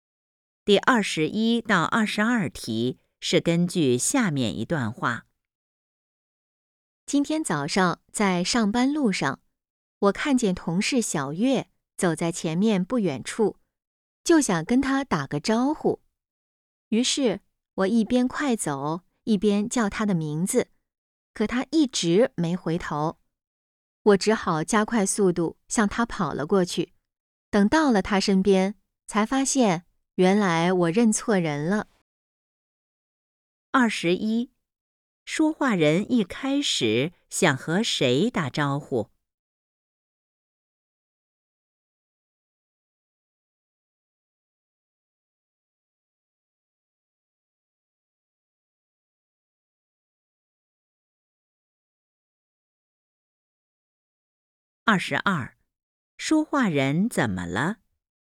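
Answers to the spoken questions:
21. 同事小月
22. 认错人了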